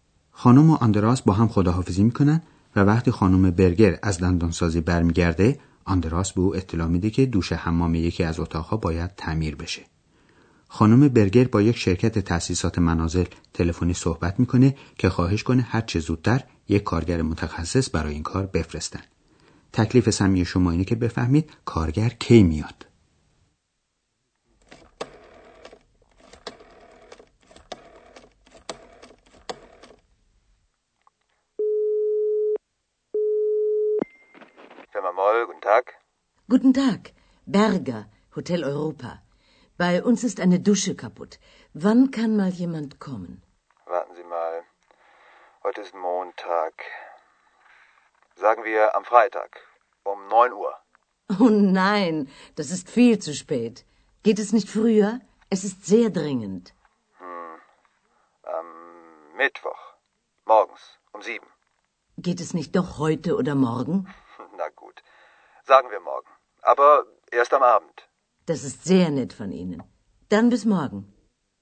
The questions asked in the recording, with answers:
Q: تکلیف سمی شما اینه که بفهمید کارگر کی میاد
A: خانم برگر بالاخره موفق شد مأمور شرکت رو راضی کنه که کارگر اونها فردا شب بیاد.